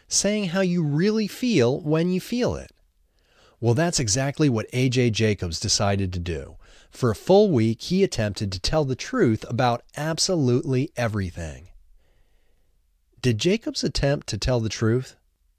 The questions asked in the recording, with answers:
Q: Did Jacobs attempt to tell the truth?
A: Yes, Jacobs attempted to tell the truth.